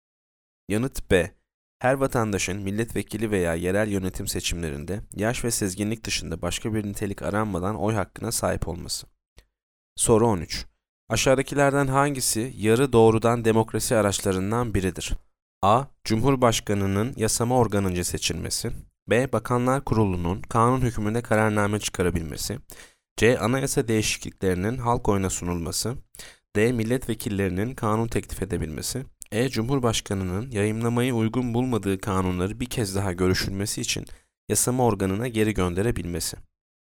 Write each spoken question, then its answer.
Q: Aşağıdakilerden hangisi yarı doğrudan demokrasi araçlarından biridir?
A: Yanıt C. Anayasa değişikliklerinin halk oyuna sunulması.